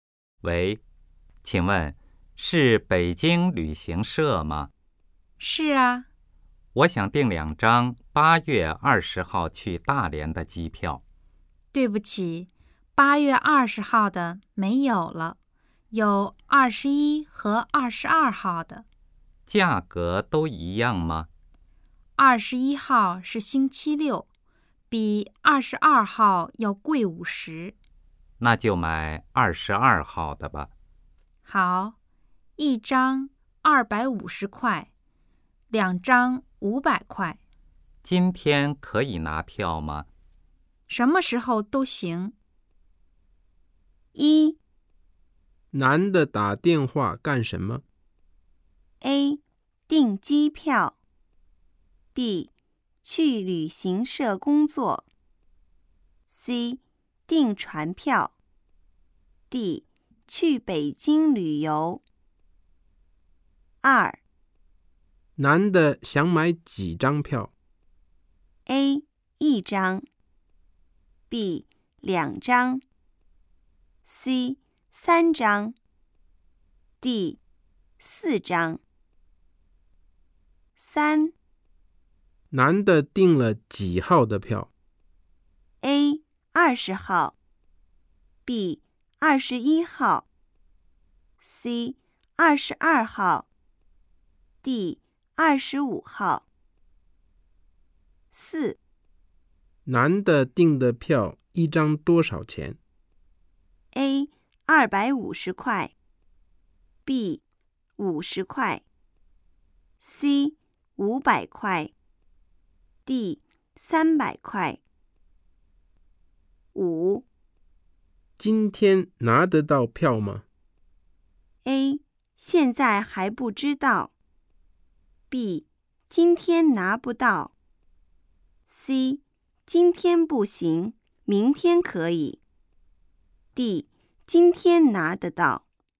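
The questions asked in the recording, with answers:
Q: 男的打电话干什么?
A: A: 订机票。

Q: 男的想买几张票?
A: B: 2张。

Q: 男的订了几号的票?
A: C: 22号。

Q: 男的订的票一张多少钱?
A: A: 250块。

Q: 今天拿得到票吗?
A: D: 今天拿得到。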